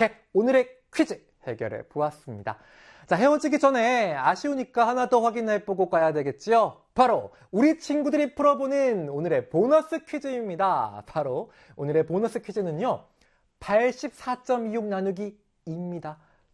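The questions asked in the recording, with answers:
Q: 바로 오늘의 보너스 퀴즈는요. 84.26 나누기 2입니다.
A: 42.13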